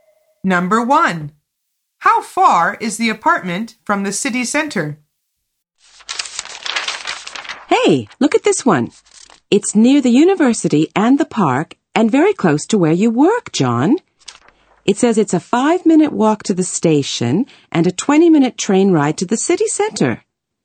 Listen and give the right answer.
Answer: The answer is 20 minutes by train.